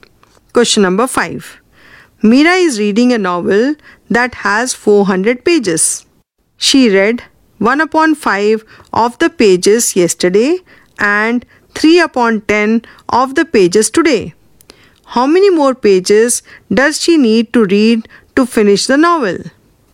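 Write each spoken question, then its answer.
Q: How many more pages does she need to read to finish the novel?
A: 200 pages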